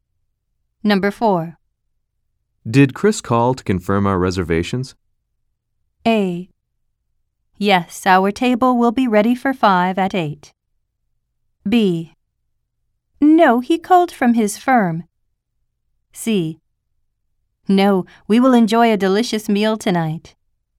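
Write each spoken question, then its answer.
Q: Did Chris call to confirm our reservations?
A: B: Yes, our table will be ready for 5 at 8.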